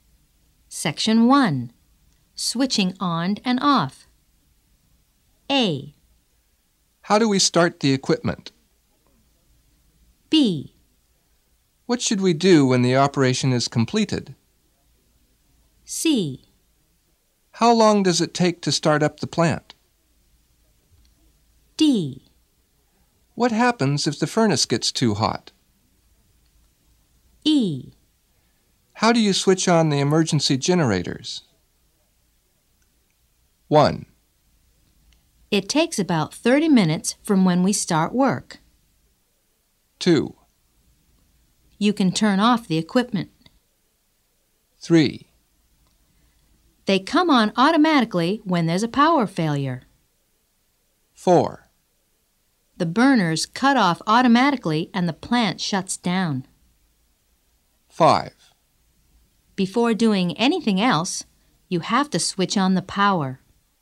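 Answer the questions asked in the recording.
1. 5: Before doing anything else, you have to switch on the power.
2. 2: You can turn off the equipment.
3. 1: It takes about 30 minutes from when we start work.
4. 4: The burners cut off automatically and the plant shuts down.
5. 3: They come on automatically when there's a power failure.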